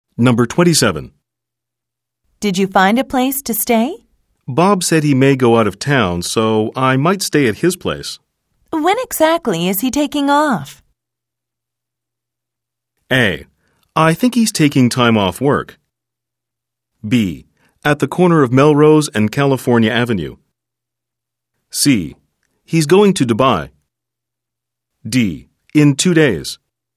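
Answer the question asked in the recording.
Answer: D: In 2 days.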